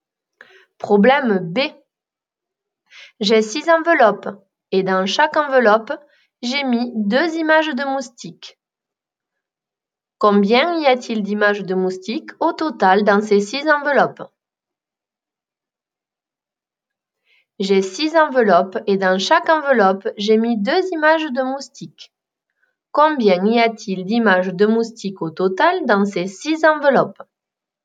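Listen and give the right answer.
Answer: 12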